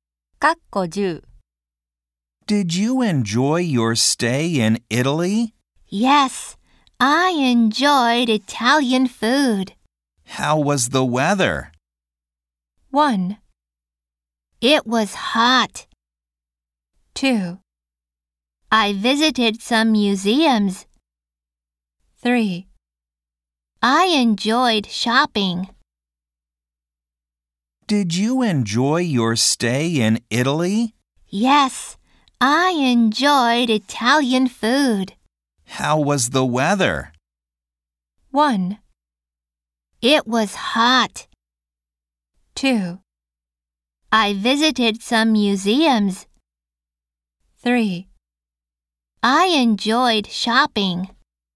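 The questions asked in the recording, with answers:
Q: How was the weather?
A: 1: It was hot.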